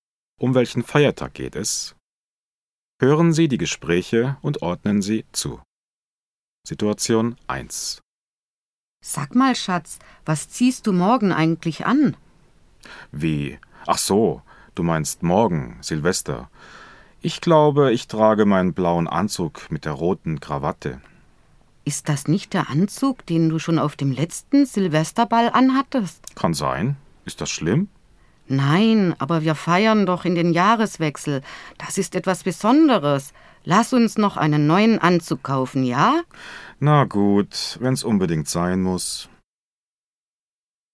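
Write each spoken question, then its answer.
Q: Um welchen Feiertag geht es?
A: Silvester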